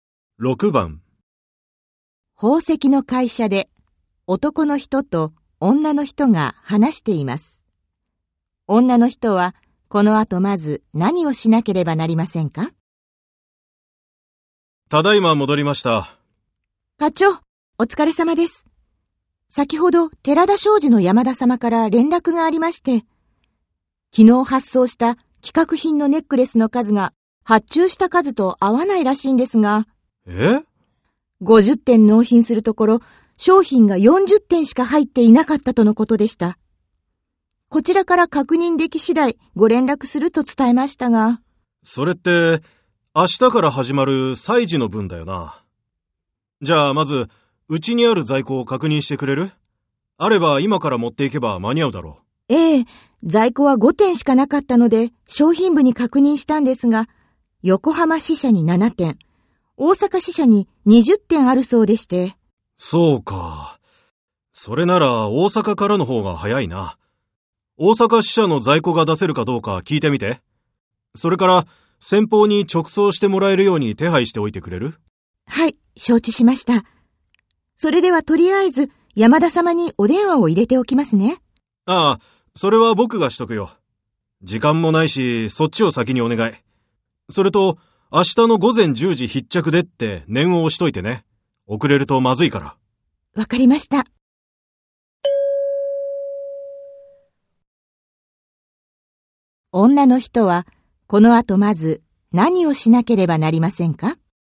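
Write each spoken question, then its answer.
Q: 女の人は、この後まず、何をしなければなりませんか?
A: 大阪支社に在庫が出せるかどうか聞く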